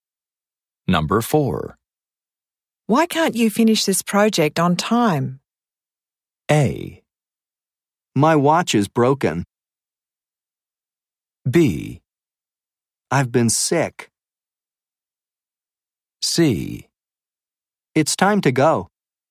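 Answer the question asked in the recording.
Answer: B: I've been sick.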